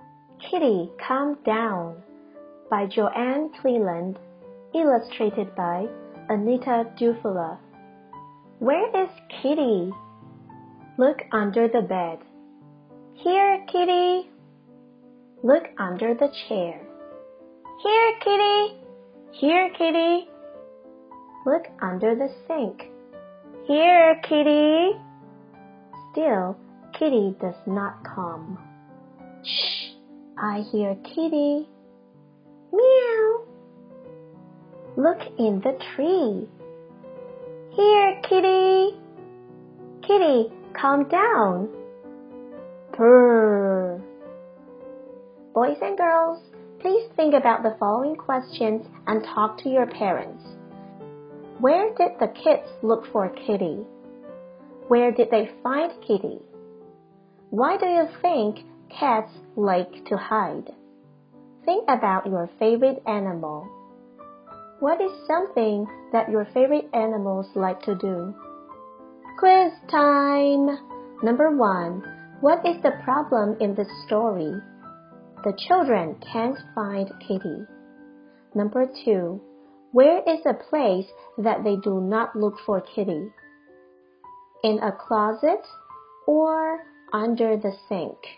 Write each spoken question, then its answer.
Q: Number two, where is a place that they do not look for Kitty? in a closet, or under the sink?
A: That's right. The answer is in a closet.